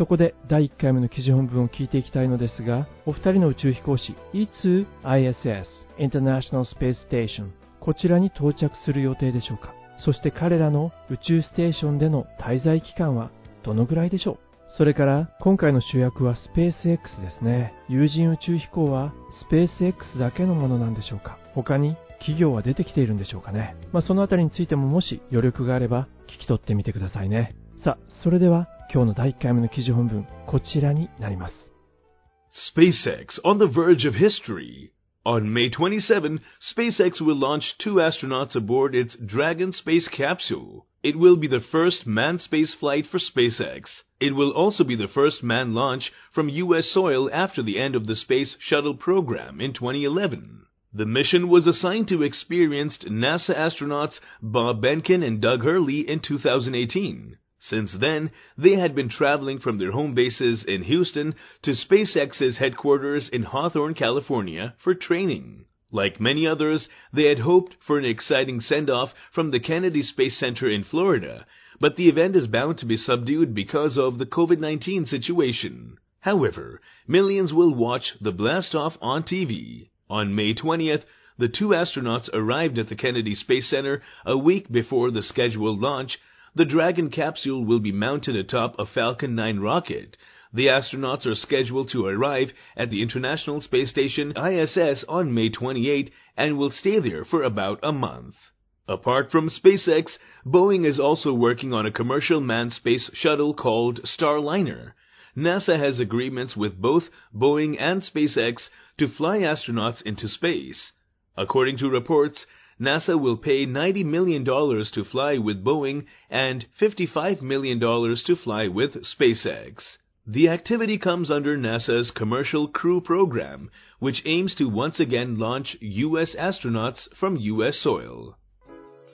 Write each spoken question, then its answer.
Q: お二人の宇宙飛行士いつ ISS International Space Station こちらに到着する予定でしょうか。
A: On May 28th. 5月の28日でした。

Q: そして彼らの宇宙ステーションでの滞在期間はどのぐらいでしょう。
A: だいたい1ヶ月ぐらい、彼らはそこでステイするようですね。

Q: 有人宇宙飛行はスペース X だけのものなんでしょうか。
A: Boeing の名前が出てきましたね。